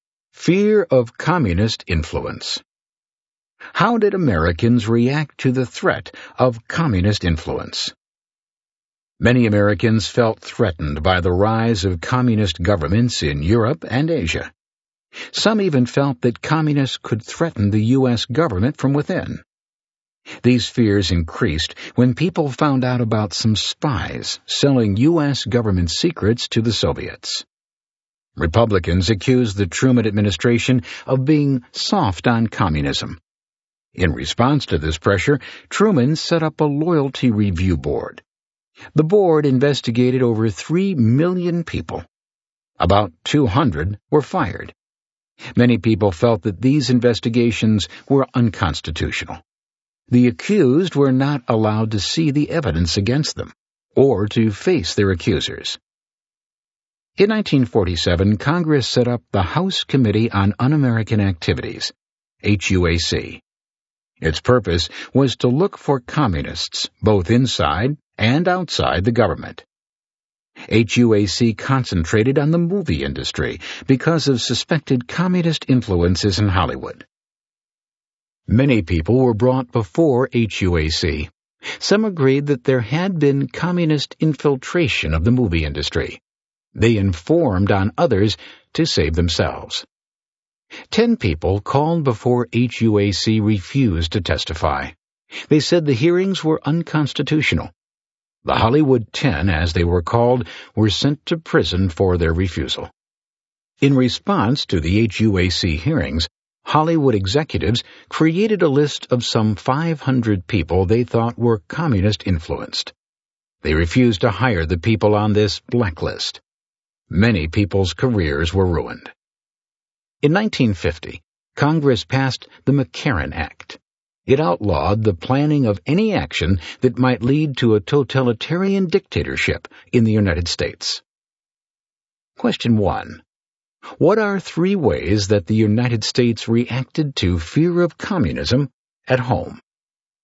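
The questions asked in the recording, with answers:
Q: What are 3 ways that the United States reacted to fear of communism at home?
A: Truman's loyalty review board, the HUAC investigations and Hollywood blacklist, and the McCarran Act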